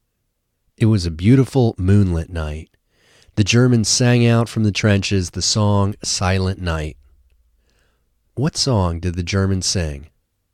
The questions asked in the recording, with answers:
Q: What song did the Germans sing?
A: The Germans sang Silent Night.